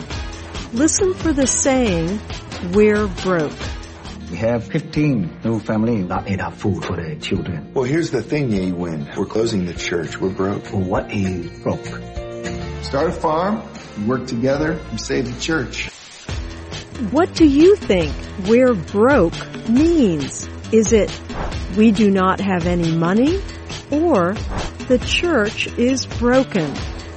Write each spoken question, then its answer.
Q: What do you think we're broke means?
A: We're broke means we do not have any money.